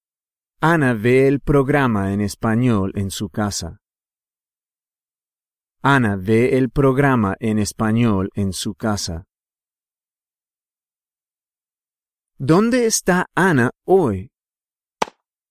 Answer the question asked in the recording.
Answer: Ana está en su casa.